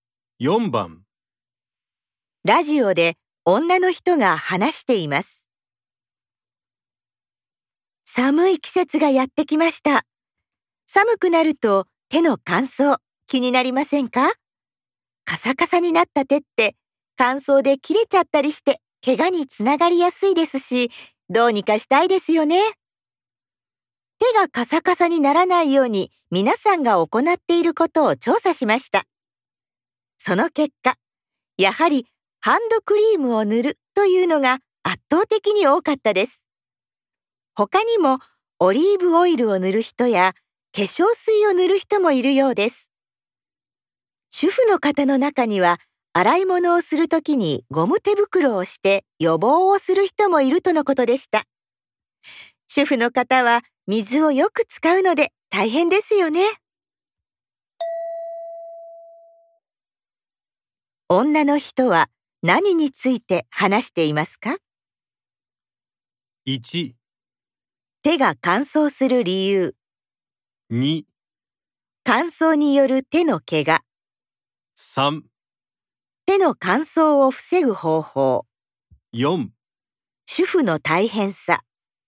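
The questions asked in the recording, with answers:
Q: 女の人は何について話していますか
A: 3: 手の乾燥を防ぐ方法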